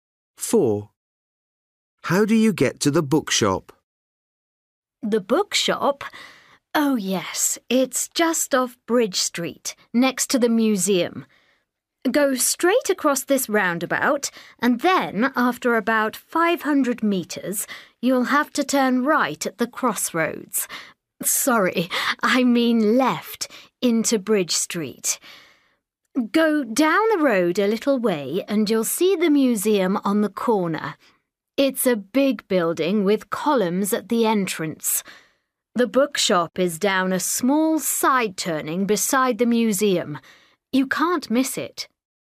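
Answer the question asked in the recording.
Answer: Across the roundabout, left at the crossroads into Bridge Street, beside the museum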